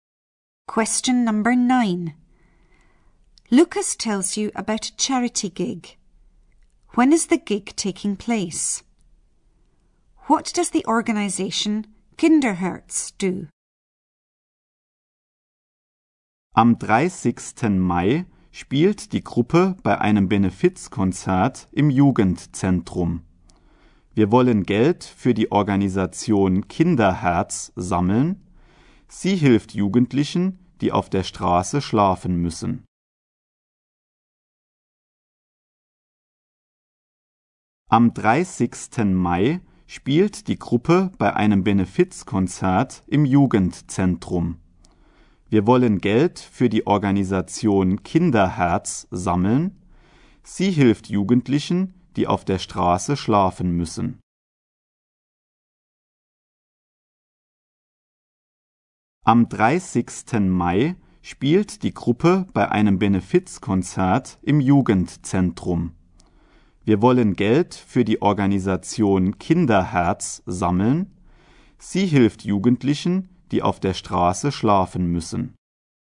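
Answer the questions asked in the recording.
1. On 30th May
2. It helps young people who have to sleep on the streets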